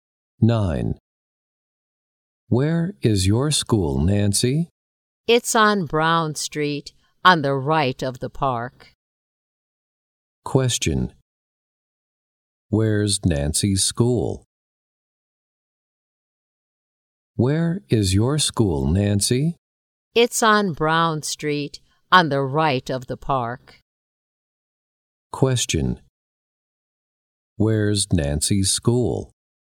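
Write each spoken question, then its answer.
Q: Where's Nancy's school?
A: On Brown Street, on the right of the park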